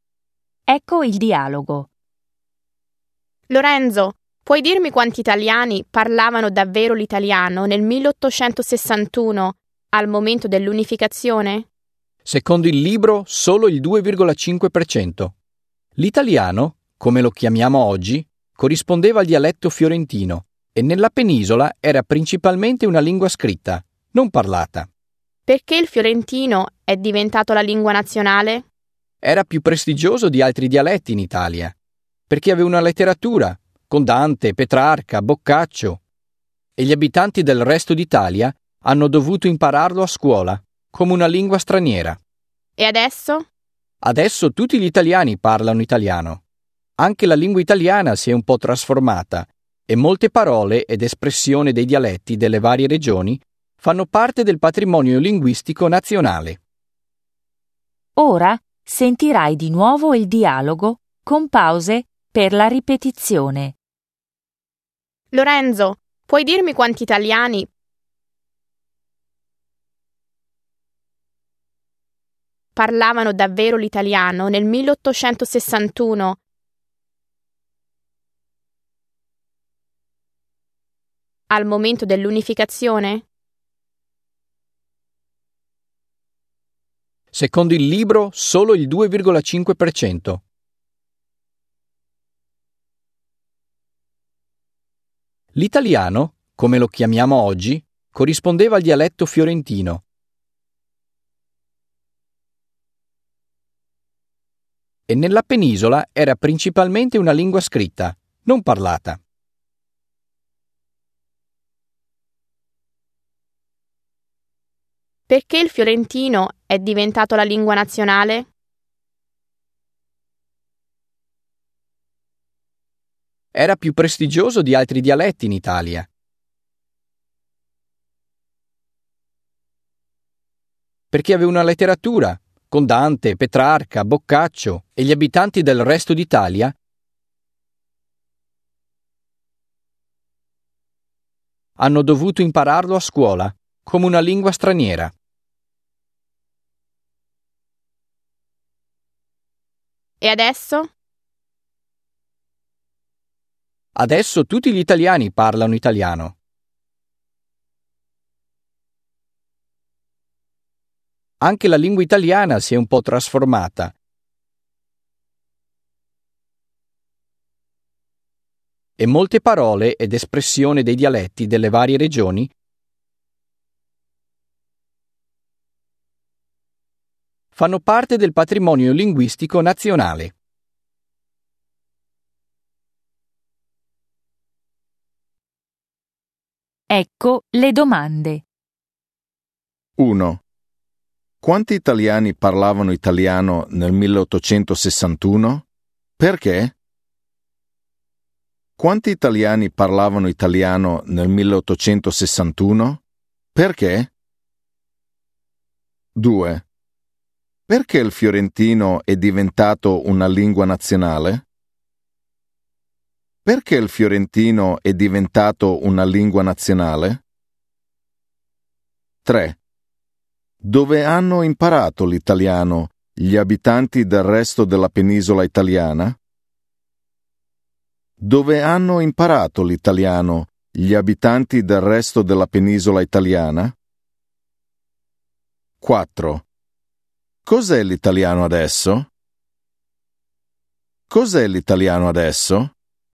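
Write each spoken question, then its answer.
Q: Quanti italiani parlavano italiano nel 1861?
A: Solo il 2,5%, perché l'italiano era principalmente una lingua scritta, non parlata

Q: Perché il fiorentino è diventato una lingua nazionale?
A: Era più prestigioso perché aveva una letteratura (Dante, Petrarca, Boccaccio)

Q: Dove hanno imparato l'italiano gli abitanti del resto della penisola italiana?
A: A scuola, come una lingua straniera

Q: Cos'è l'italiano adesso?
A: La lingua parlata da tutti gli italiani, un po' trasformata con parole dei dialetti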